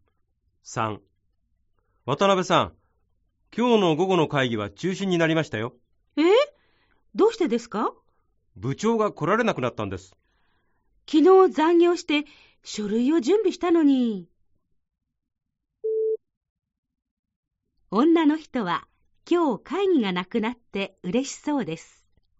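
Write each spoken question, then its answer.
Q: 女の人は今日会議がなくなって嬉しそうです。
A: ×(間違い)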